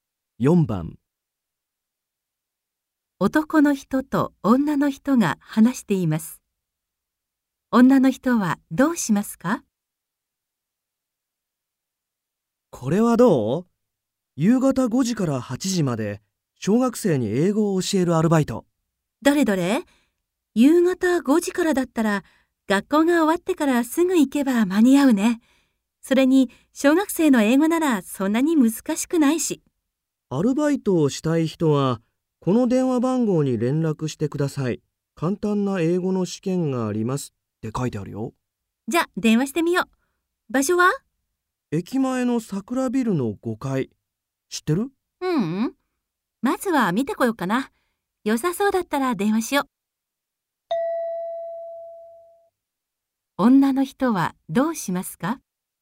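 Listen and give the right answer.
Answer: まず駅前の桜ビルの場所を見に行く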